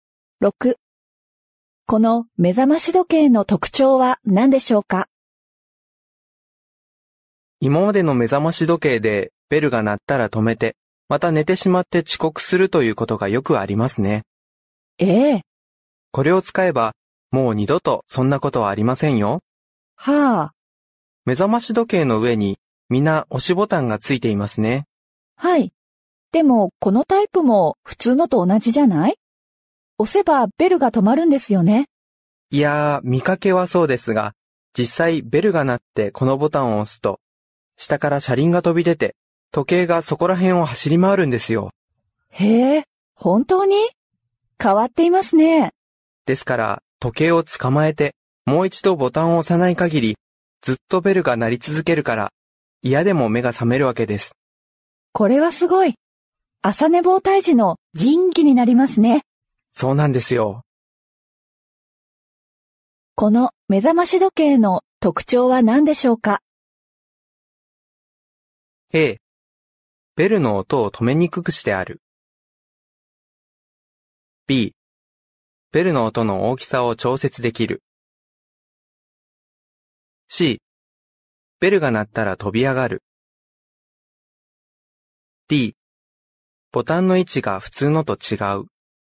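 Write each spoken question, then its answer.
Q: この目覚まし時計の特徴は何でしょうか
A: A: ベルの音を止めにくくしてある。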